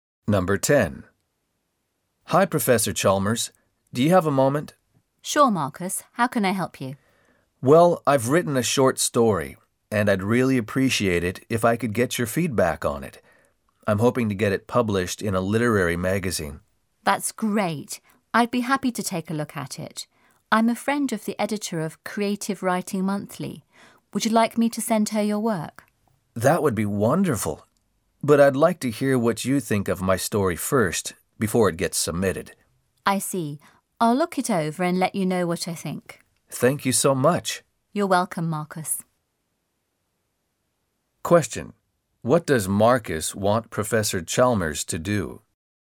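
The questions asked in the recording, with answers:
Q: What does Marcus want Professor Chalmers to do?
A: Read his short story and give him feedback on it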